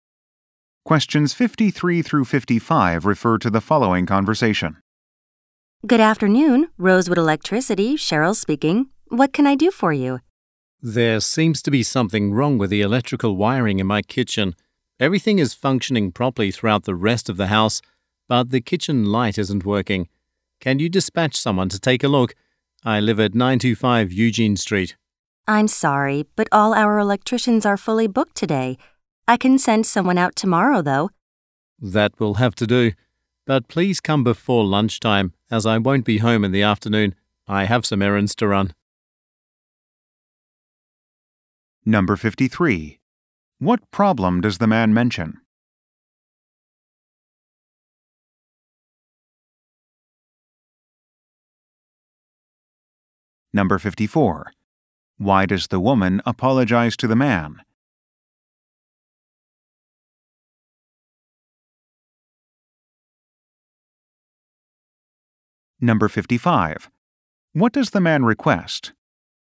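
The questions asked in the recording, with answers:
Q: What problem does the man mention?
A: The kitchen light isn't working

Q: Why does the woman apologize to the man?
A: All electricians are booked today

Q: What does the man request?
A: That someone come before lunchtime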